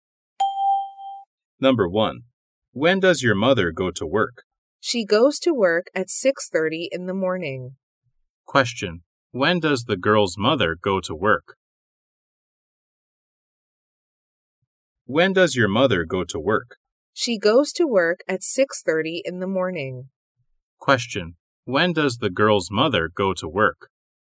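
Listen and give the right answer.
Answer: At 6:30 in the morning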